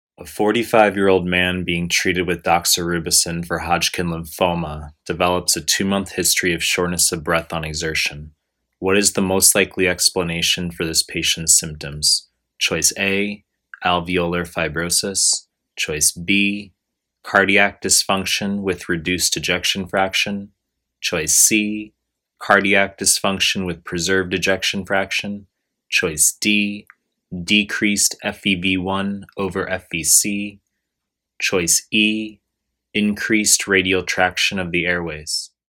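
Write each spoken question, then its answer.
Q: What is the most likely explanation for this patient's symptoms?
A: B: cardiac dysfunction with reduced ejection fraction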